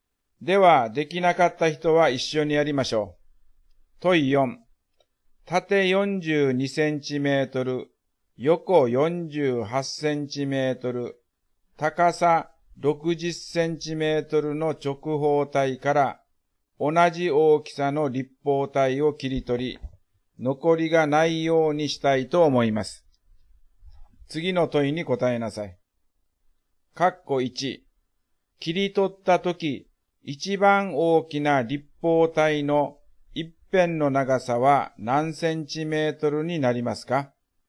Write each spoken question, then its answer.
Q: 切り取ったとき、一番大きな立方体の一辺の長さは何センチメートルになりますか?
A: 42、48、60の最大公約数は6ですね